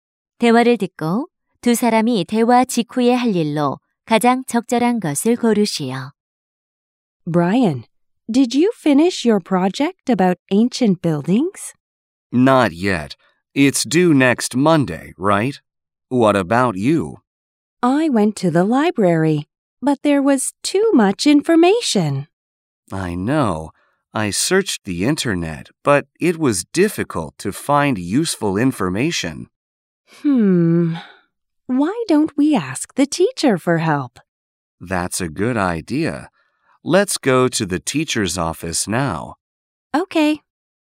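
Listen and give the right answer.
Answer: 선생님 사무실에 가서 도움 요청하기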